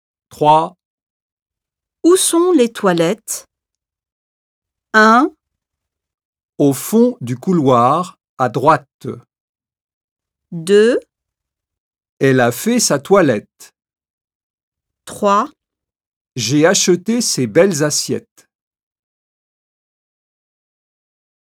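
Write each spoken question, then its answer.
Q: Où sont les toilettes?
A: 1: Au fond du couloir, à droite.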